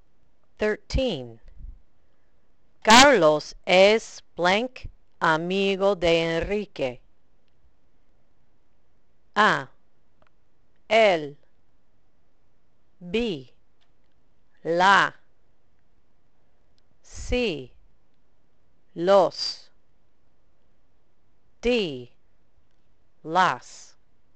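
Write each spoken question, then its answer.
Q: Carlos es blank amigo de Enrique.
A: A: él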